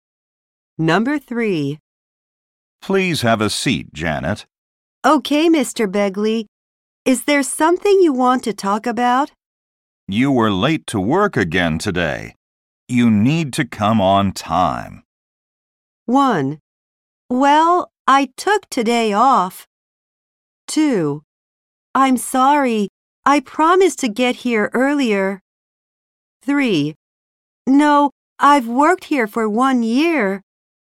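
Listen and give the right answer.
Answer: 2: I'm sorry. I promised to get here earlier.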